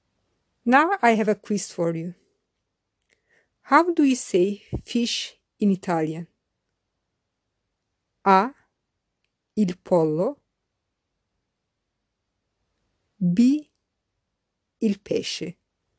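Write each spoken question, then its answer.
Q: How do you say fish in Italian?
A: B: Il pesce.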